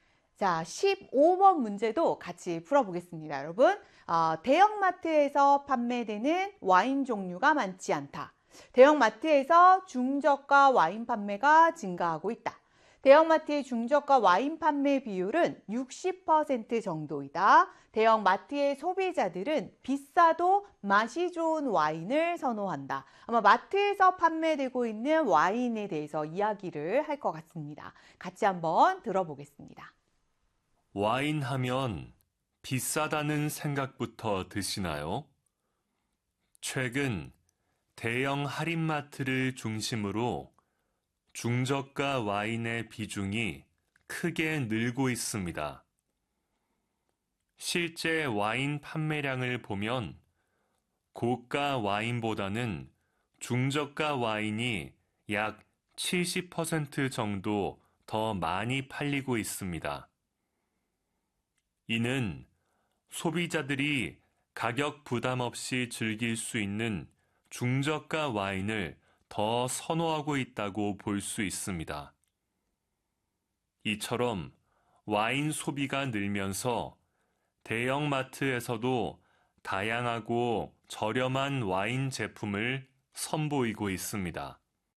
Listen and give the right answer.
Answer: 그래서 정답은 2번이 되는 것입니다.